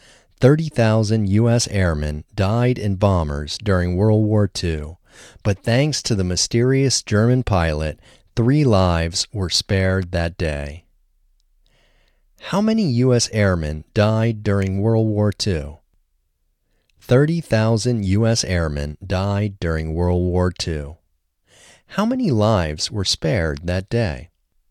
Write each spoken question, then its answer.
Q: How many lives were spared that day?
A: Three lives were spared that day.